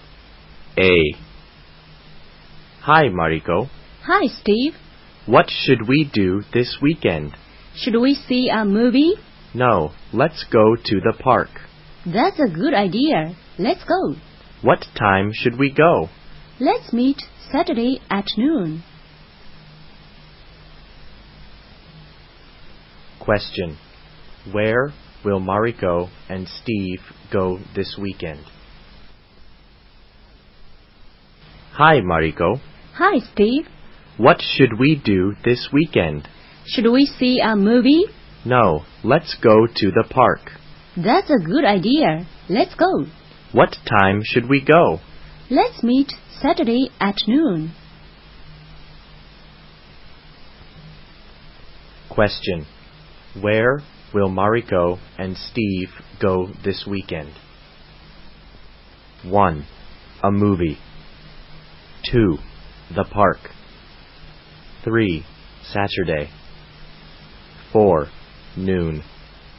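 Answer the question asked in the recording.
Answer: 2: The park.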